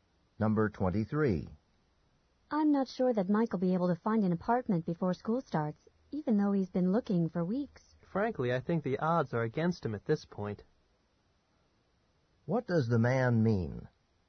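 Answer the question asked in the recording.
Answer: Mike probably won't find an apartment in time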